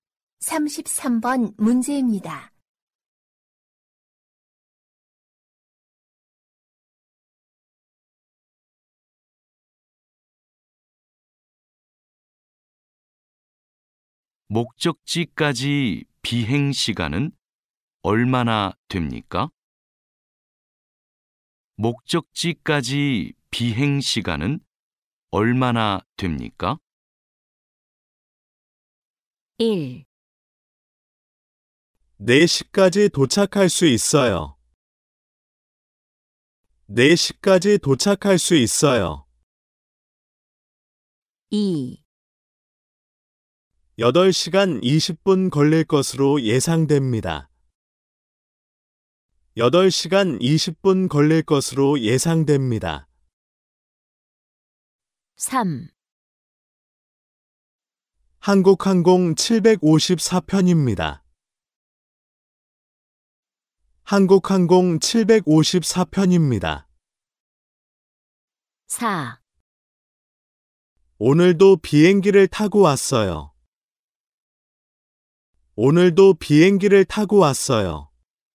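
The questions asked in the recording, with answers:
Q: 목적지까지 비행 시간은 얼마나 됩니까?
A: 2: 8시간 20분 걸릴 것으로 예상됩니다.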